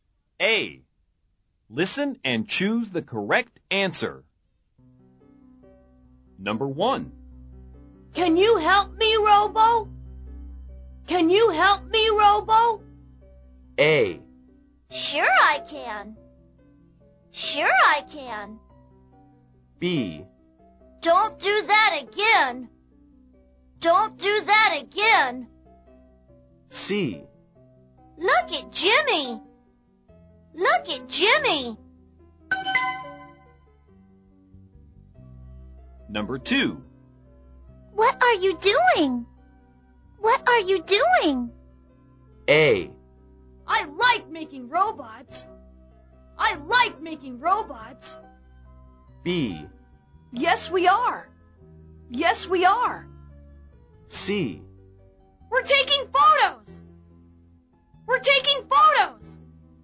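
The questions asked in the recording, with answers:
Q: Can you help me, Robo? Can you help me, Robo?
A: A: Sure I can.

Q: What are you doing? What are you doing?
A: C: We're taking photos.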